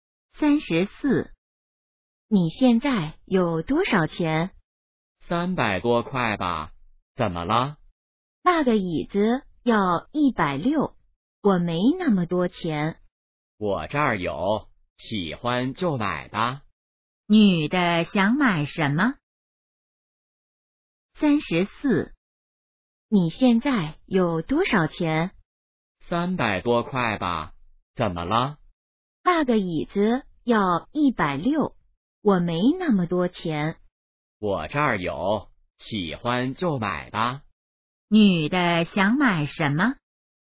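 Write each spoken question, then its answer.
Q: 女的想买什么?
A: 椅子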